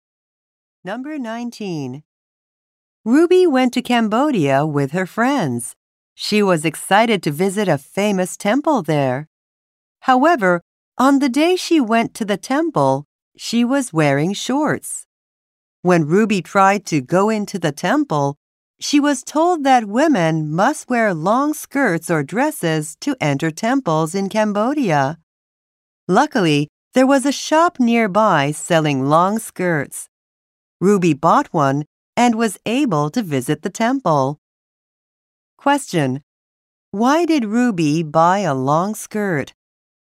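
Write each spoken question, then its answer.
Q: Why did Ruby buy a long skirt?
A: Women must wear long skirts or dresses to enter the temple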